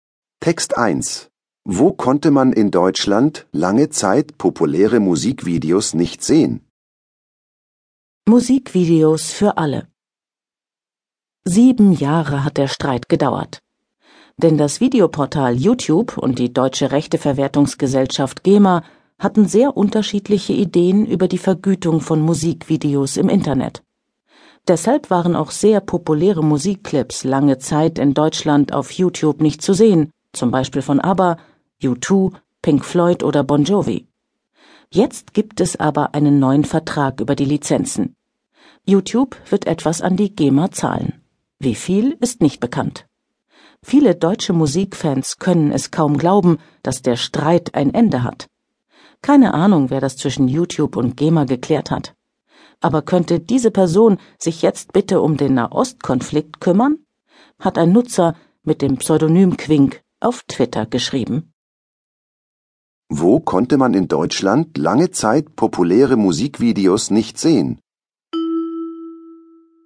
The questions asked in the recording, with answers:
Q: Wo konnte man in Deutschland lange Zeit populäre Musikvideos nicht sehen?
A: Im Videoportal YouTube.